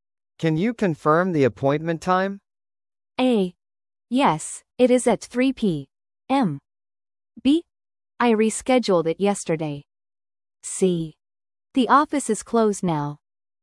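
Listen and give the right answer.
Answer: A: Yes, it is at 3 p.m.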